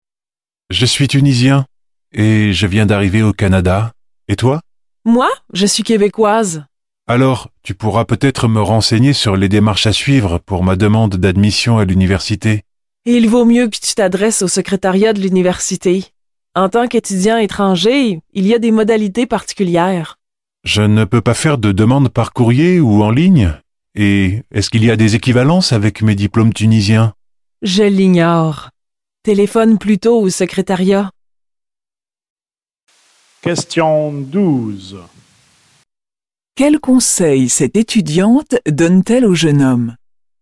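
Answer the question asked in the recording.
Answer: Téléphoner au secrétariat de l'université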